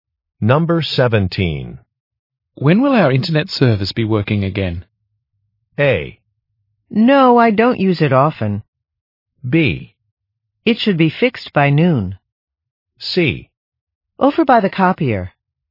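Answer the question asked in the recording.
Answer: B: It should be fixed by noon.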